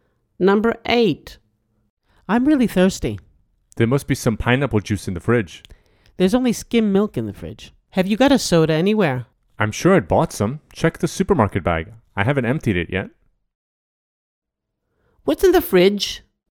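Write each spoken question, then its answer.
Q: What's in the fridge?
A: Skim milk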